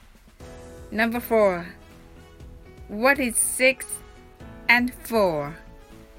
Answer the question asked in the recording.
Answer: The answer is 10.